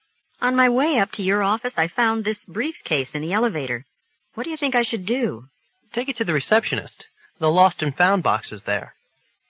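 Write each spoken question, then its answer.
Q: What does the man suggest the woman do?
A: Take the briefcase to the receptionist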